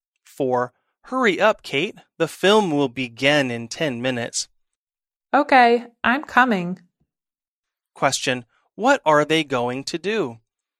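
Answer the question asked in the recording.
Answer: See a film.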